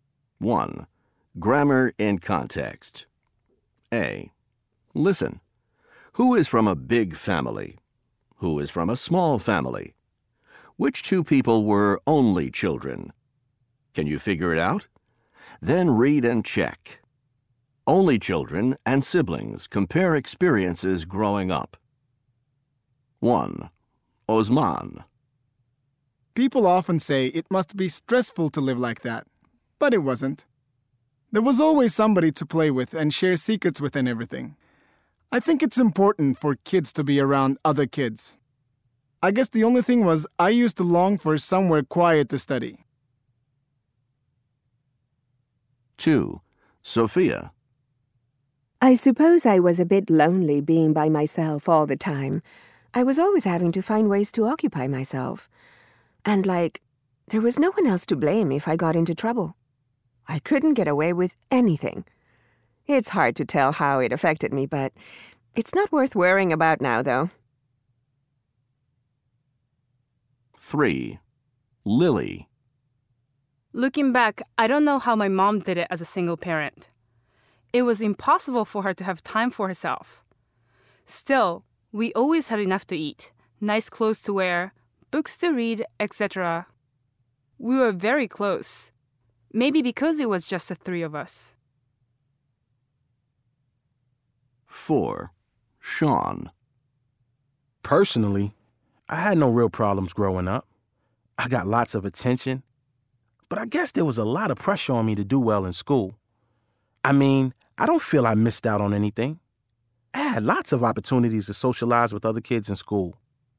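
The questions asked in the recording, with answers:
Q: Who is from a big family?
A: Osman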